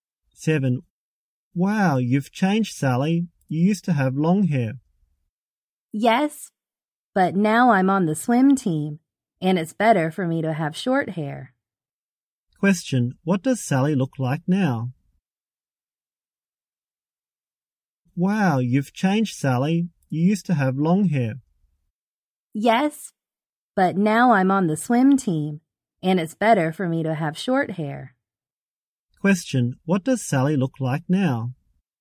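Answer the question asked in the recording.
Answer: She has short hair.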